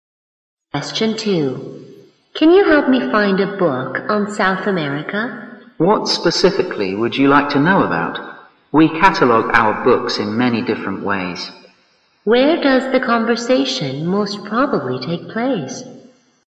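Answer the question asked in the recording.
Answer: In a library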